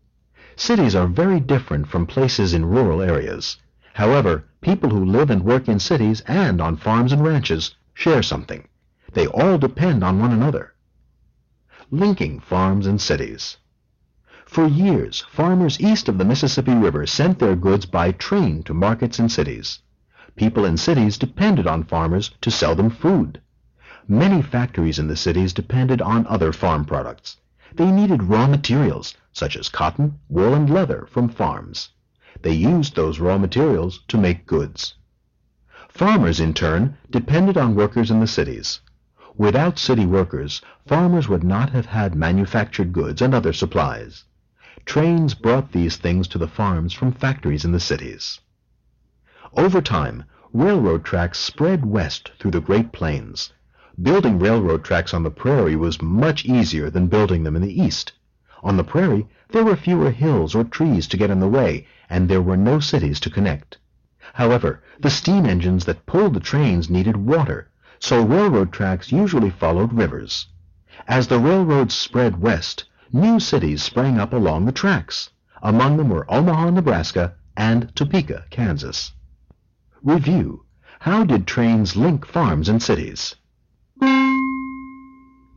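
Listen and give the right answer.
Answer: Trains carried farm goods to city markets and brought manufactured goods and supplies from city factories to farms.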